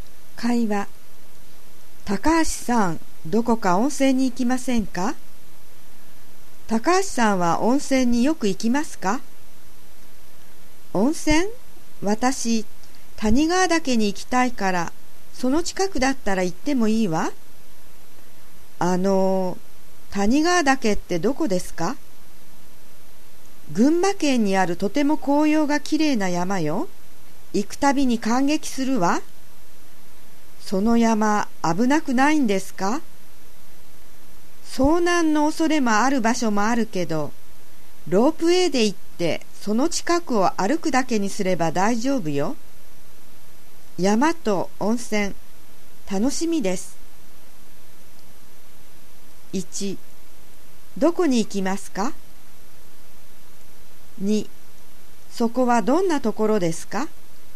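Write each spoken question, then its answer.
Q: どこに行きますか?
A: 谷川岳とその近くの温泉

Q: そこはどんなところですか?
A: 群馬県にある、紅葉がとてもきれいな山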